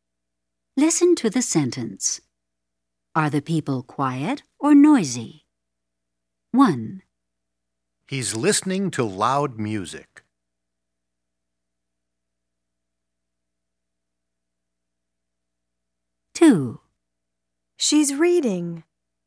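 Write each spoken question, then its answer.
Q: Are the people quiet or noisy?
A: noisy

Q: Are the people quiet or noisy?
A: quiet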